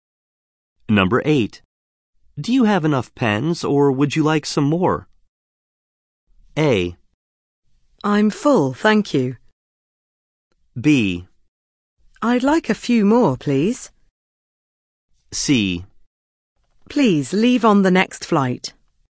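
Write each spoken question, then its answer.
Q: Do you have enough pens or would you like some more?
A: B: I'd like a few more, please.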